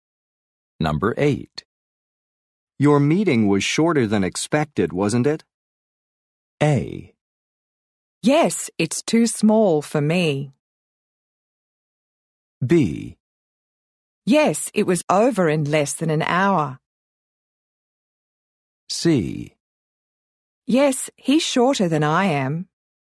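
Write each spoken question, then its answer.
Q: Your meeting was shorter than expected, wasn't it?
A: B: Yes, it was over in less than an hour.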